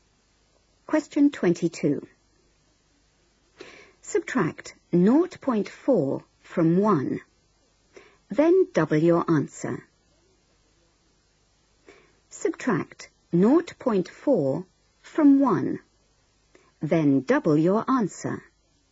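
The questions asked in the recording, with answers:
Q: Subtract 0.4 from 1, then double your answer.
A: 1.2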